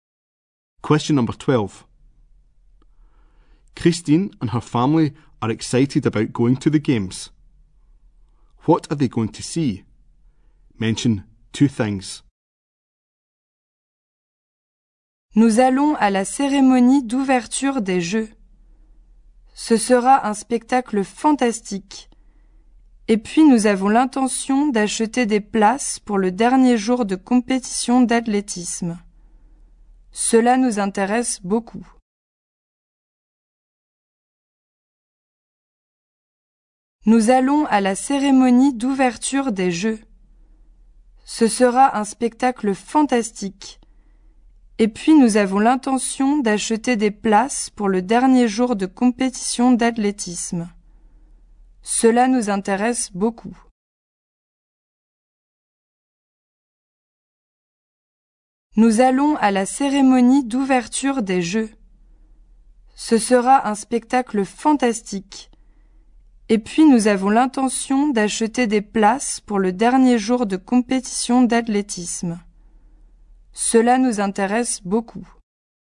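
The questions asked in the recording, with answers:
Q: What are they going to see?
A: The opening ceremony; the last day of the athletics competition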